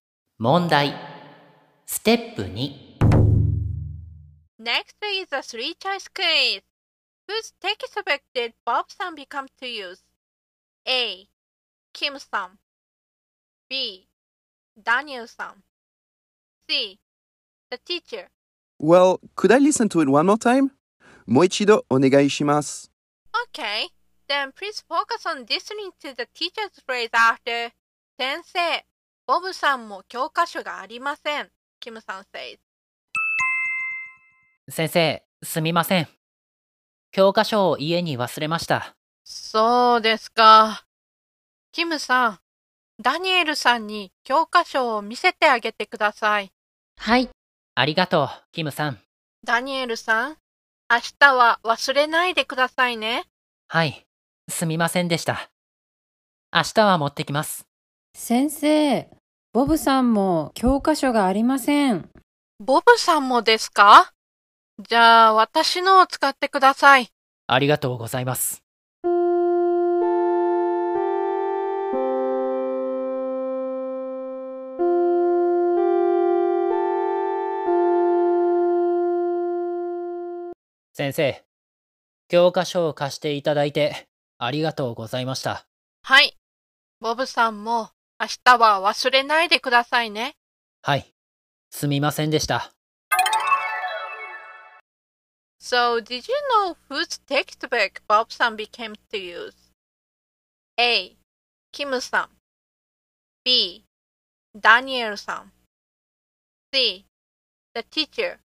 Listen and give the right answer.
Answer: So the answer is C.